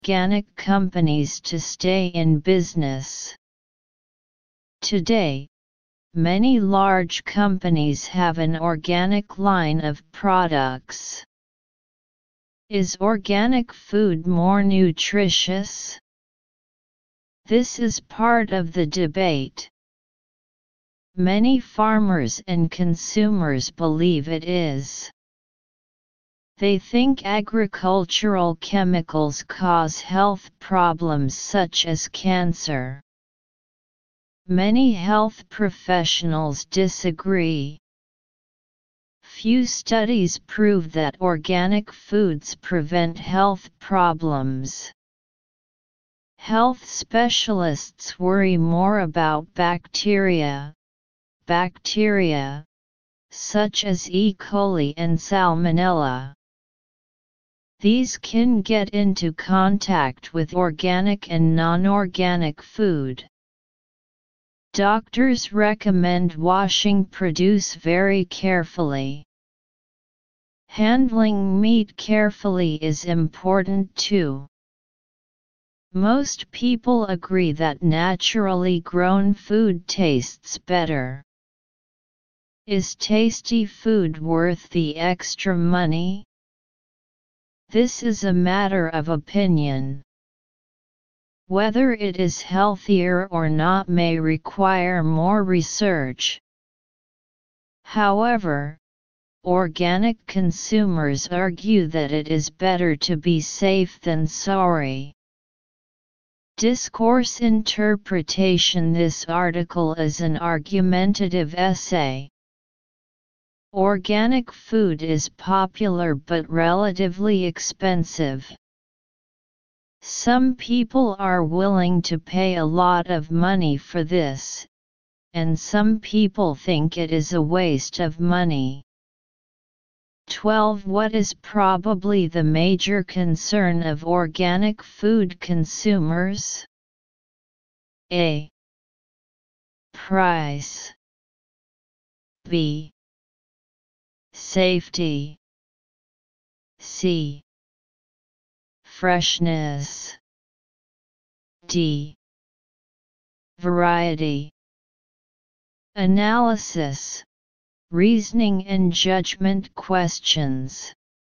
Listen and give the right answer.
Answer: Answer B.